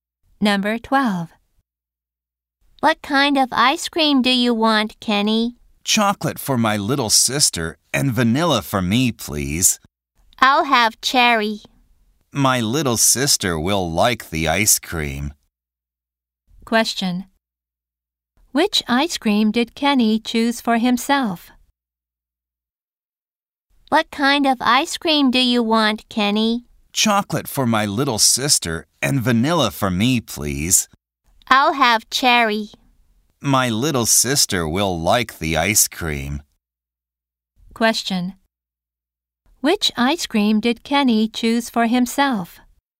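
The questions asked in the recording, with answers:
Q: Which ice cream did Kenny choose for himself?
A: Vanilla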